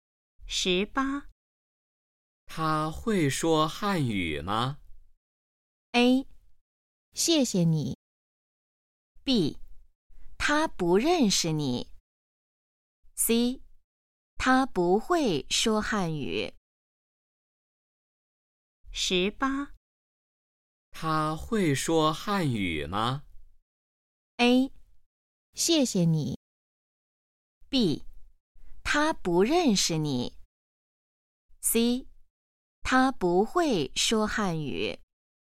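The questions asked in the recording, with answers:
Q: 他会说汉语吗?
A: C: 他不会说汉语。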